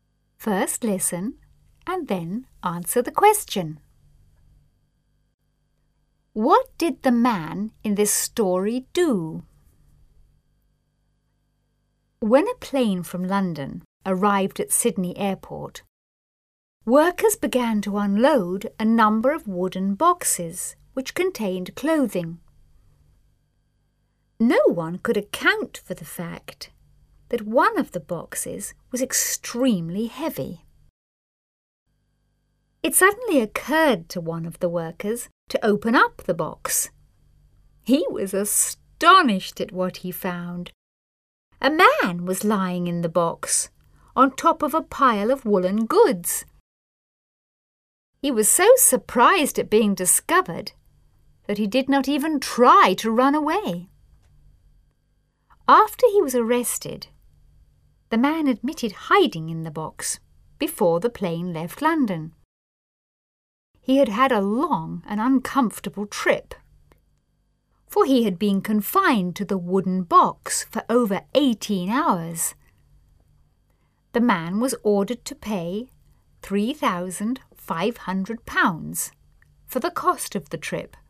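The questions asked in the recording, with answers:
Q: What did the man in this story do?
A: He hid in a wooden box on a plane from London to Sydney to travel without a ticket.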